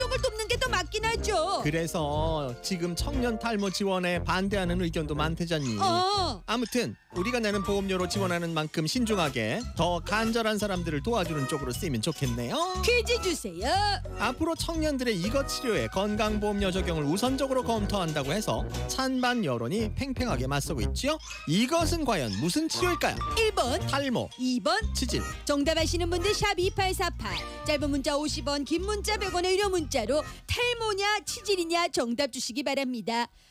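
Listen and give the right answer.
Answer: 1번: 탈모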